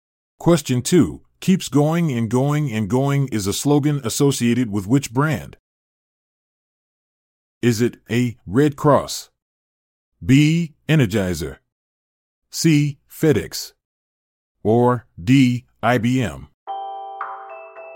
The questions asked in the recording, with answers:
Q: Keeps going and going and going is a slogan associated with which brand?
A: The answer is B. Energizer.